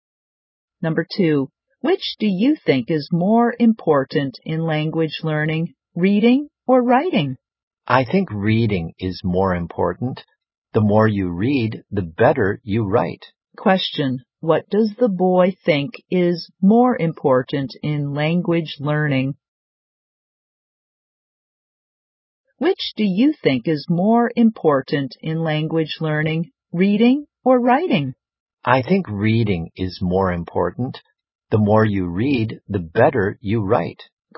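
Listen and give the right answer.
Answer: Reading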